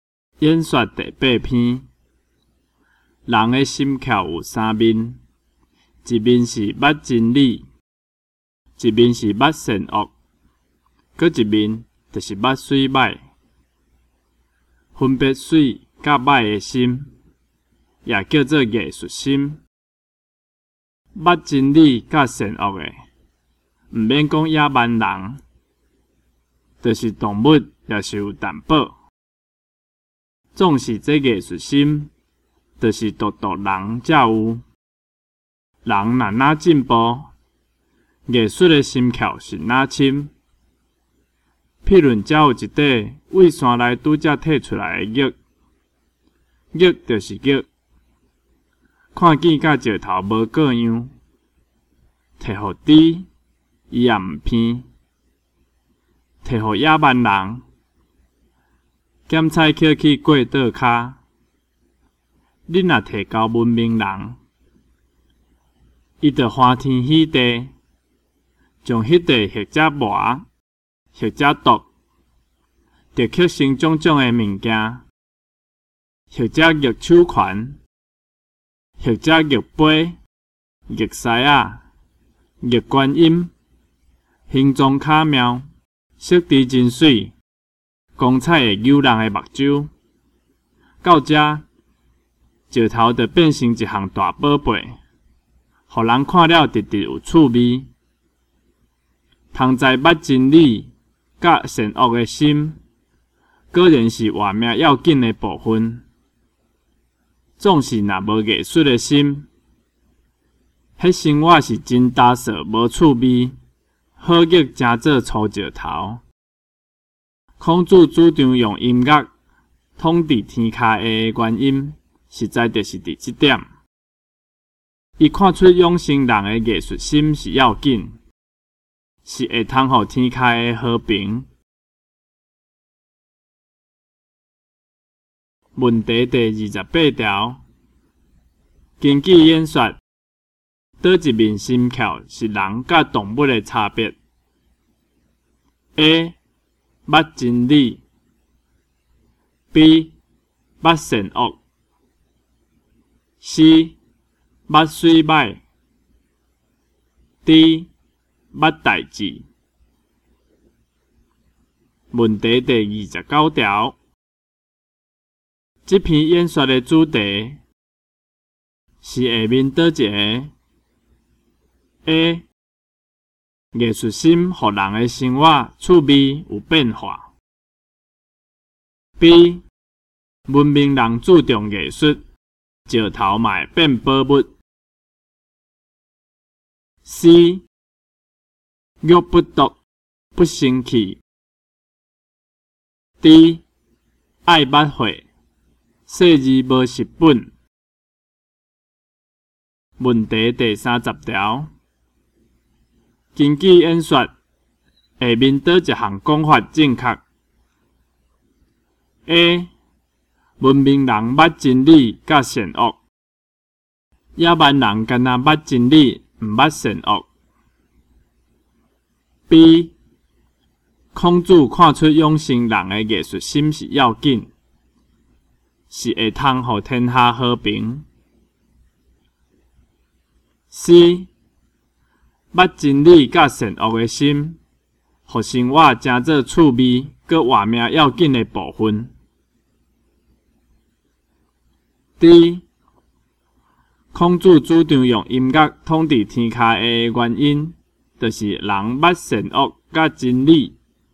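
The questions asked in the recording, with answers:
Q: 根据演说,倒一面心窍是人甲动物的差别 ?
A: C: 捌水歹

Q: 这篇演说的主题是下面倒一个 ?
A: A: 艺术心予人的生活趣味有变化。

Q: 根据演说,下面倒一项讲法正确 ?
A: B: 孔子看出养成人的艺术心是要紧,是会通予天下和平。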